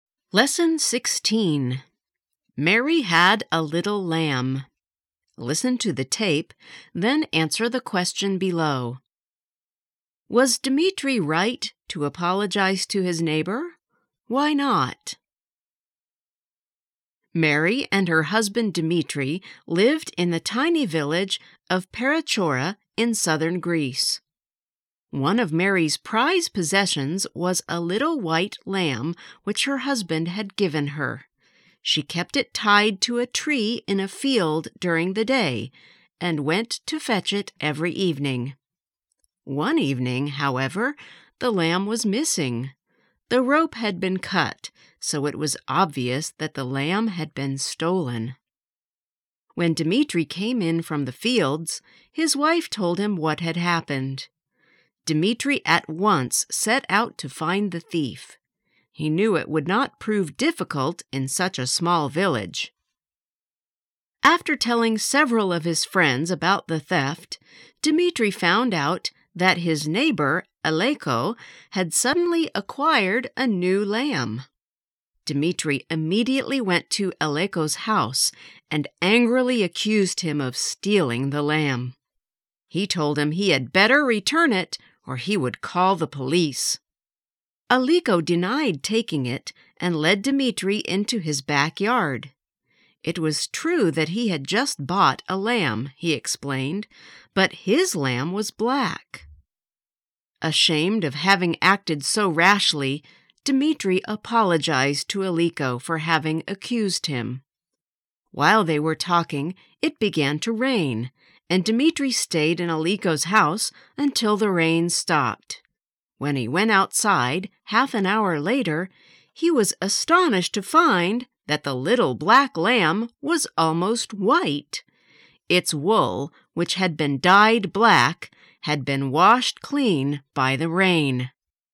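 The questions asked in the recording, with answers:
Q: Was Dmitri right to apologize to his neighbor?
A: No, because Aleko had stolen the lamb and dyed it black; the rain washed the dye off and showed it was white.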